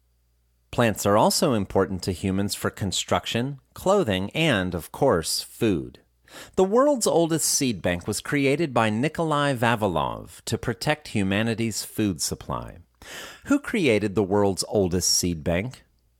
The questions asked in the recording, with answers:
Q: Who created the world's oldest seed bank?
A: Nikolai Vavilov created the world's oldest seed bank.